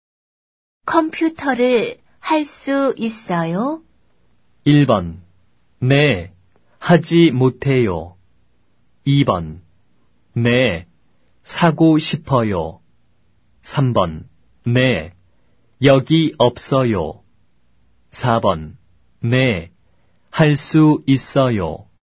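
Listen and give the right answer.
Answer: 4: 네, 할 수 있어요.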